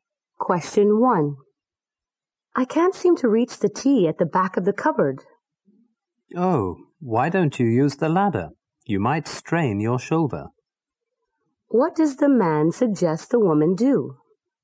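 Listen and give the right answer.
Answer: Use the ladder.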